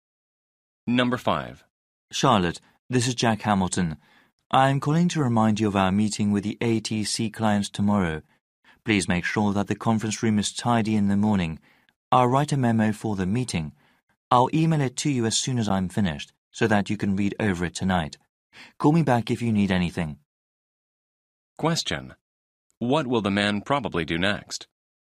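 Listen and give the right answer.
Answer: Write a memo for the meeting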